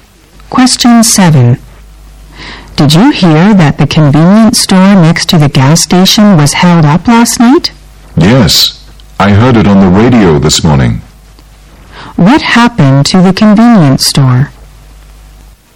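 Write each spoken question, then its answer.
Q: What happened to the convenience store?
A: It was robbed last night.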